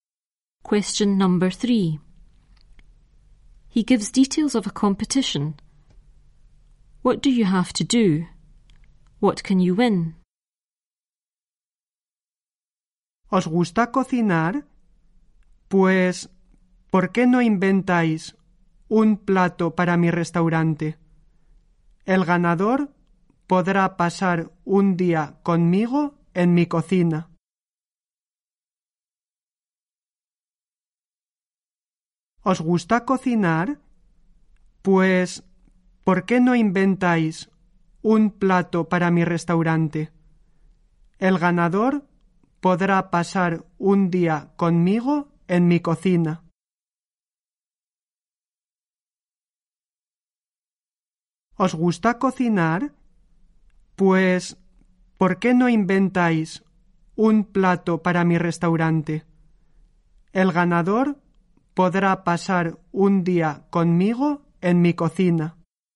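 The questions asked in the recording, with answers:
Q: What do you have to do? What can you win?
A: Invent a dish for his restaurant; win a day with him in his kitchen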